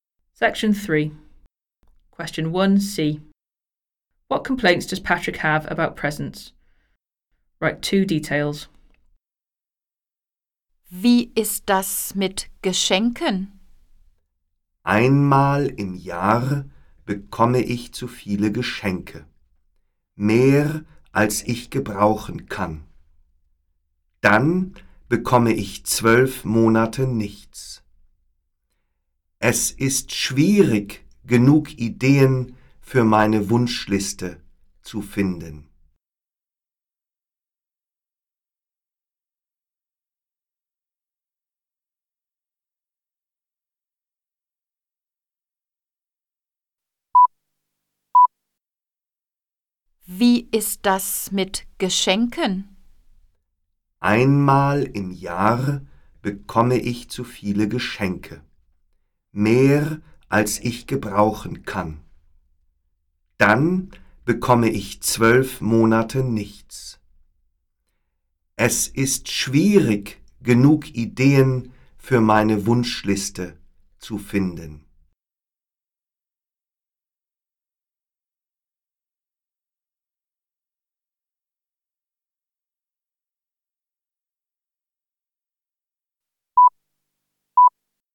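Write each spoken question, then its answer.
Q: What complaints does Patrick have about presents?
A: He gets too many presents once a year and then nothing for 12 months; hard to find ideas for his wish list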